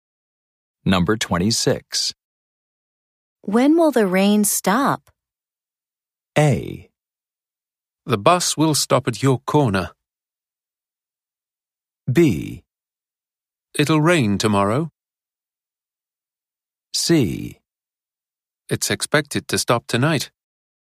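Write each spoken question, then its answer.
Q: When will the rain stop?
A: C: It's expected to stop tonight.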